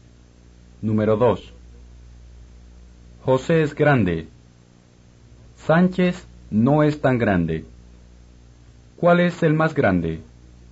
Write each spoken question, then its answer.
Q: ¿Cuál es el más grande?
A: José es el más grande.